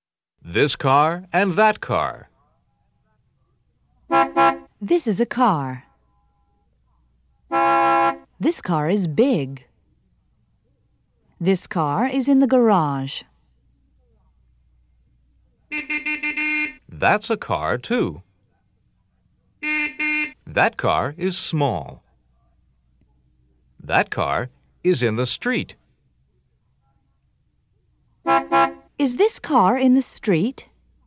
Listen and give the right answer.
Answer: No, it's not.